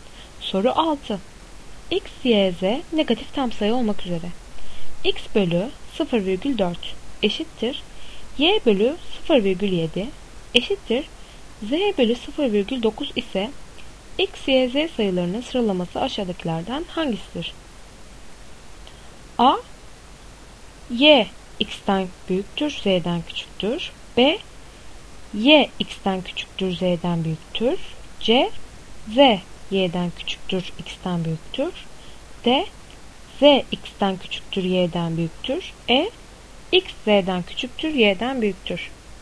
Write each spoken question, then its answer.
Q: X bölü 0,4 eşittir Y bölü 0,7 eşittir Z bölü 0,9 ise X, Y, Z sayılarının sıralaması aşağıdakilerden hangisidir?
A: Doğru cevap B. Y, X'ten küçüktür, Z'den büyüktür.